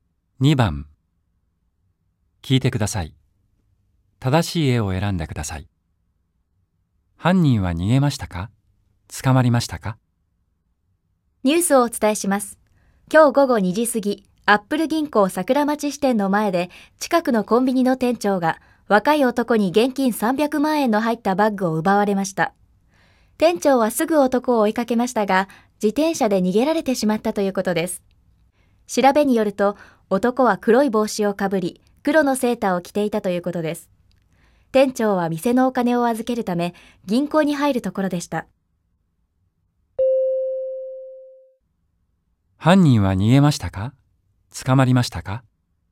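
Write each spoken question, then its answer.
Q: 犯人は逃げましたか?捕まりましたか?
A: 逃げました(自転車で逃げた)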